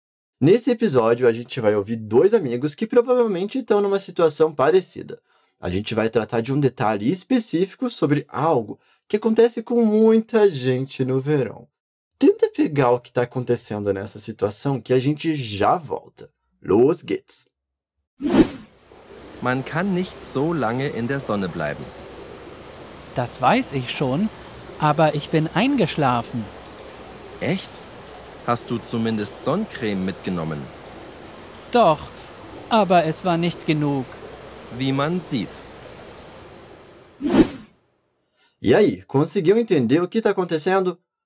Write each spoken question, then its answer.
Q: E aí, conseguiu entender o que está acontecendo?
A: Pelo visto, um dos amigos levou um torrão daqueles no sol.